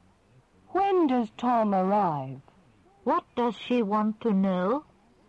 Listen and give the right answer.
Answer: She wants to know when Tom arrives.